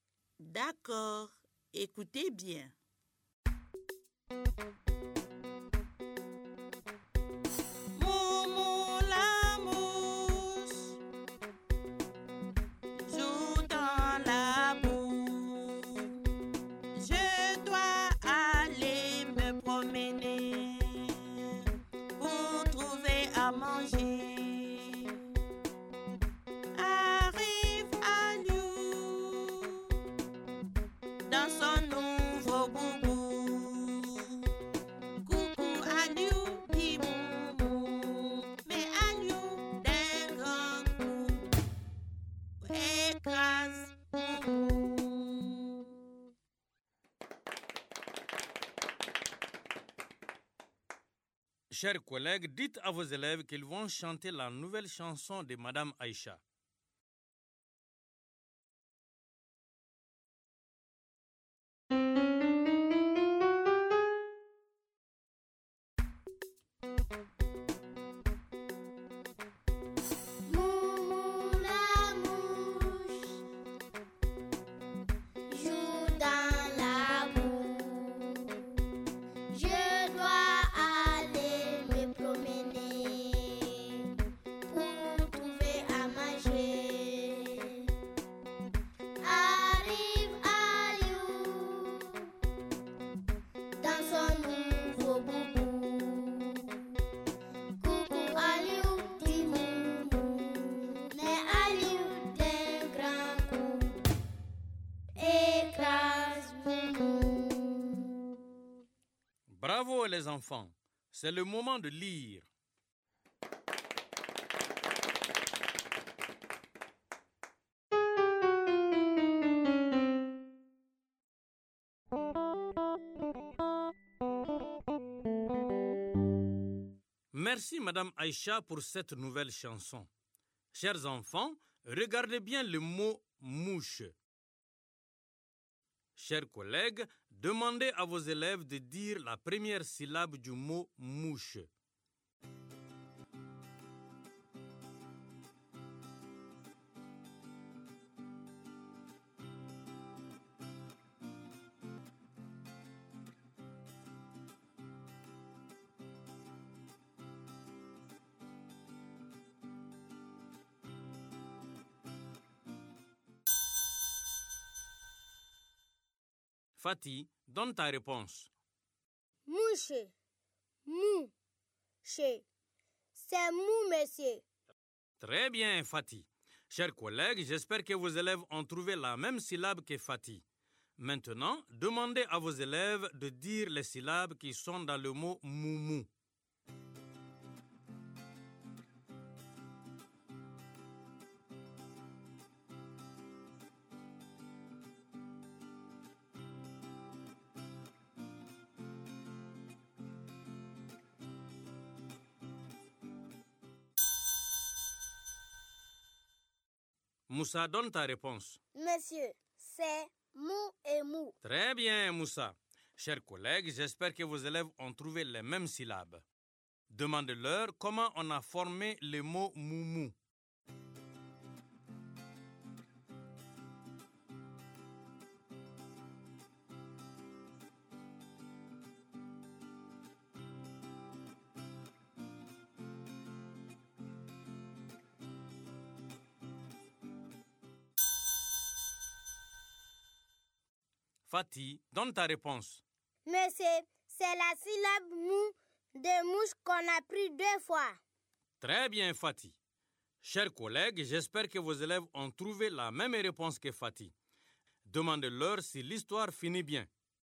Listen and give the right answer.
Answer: Non, monsieur. L'histoire ne finit pas bien pour Moumou.